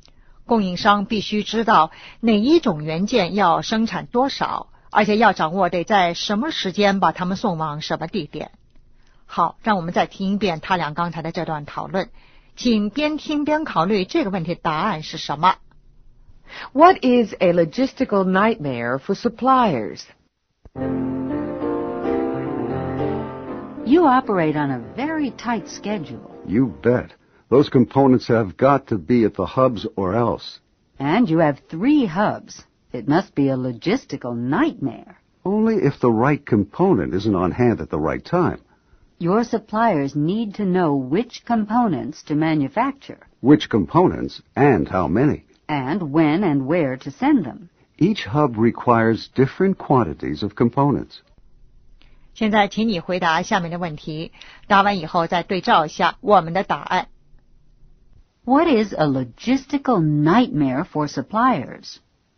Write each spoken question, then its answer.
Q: What is a logistical nightmare for suppliers?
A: Sending the right number of components at the right time.